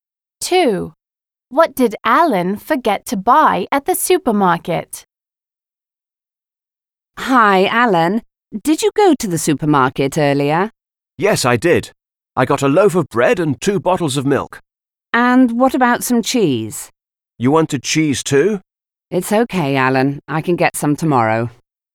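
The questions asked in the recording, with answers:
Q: What did Alan forget to buy at the supermarket?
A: Cheese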